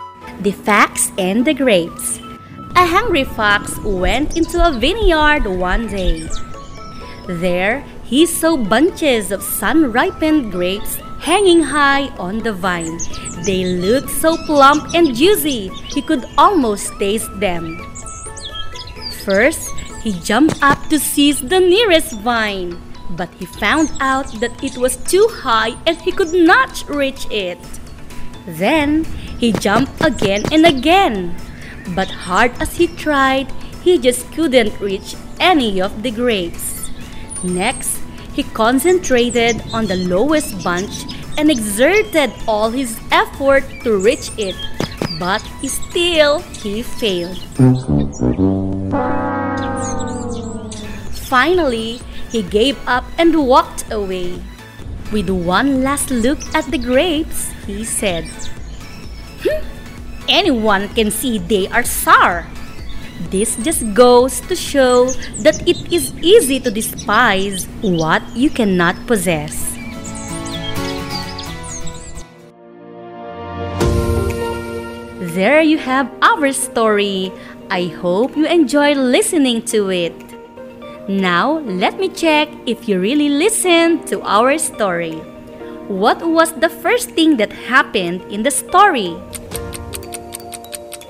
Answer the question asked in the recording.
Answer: Ma'am, a hungry fox entered a vineyard.